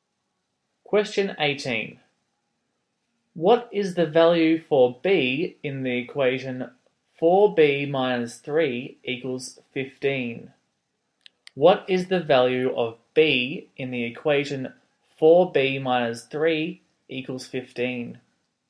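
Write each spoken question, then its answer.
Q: What is the value of B in the equation 4B minus 3 equals 15?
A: 4.5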